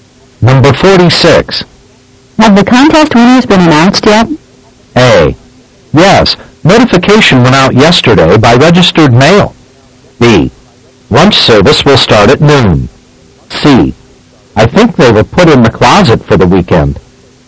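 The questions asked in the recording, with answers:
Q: Have the contest winners been announced yet?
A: A: Yes, notification went out yesterday by registered mail.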